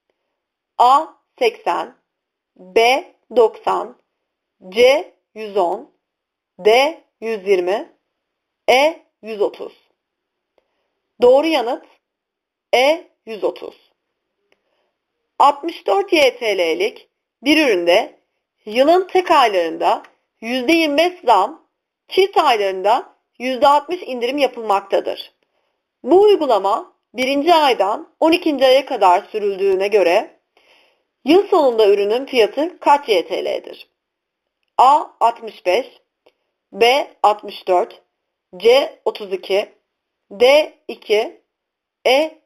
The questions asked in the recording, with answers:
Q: Bu uygulama 1. aydan 12. aya kadar sürüldüğüne göre yıl sonunda ürünün fiyatı kaç YTL'dir?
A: Doğru yanıt E. 1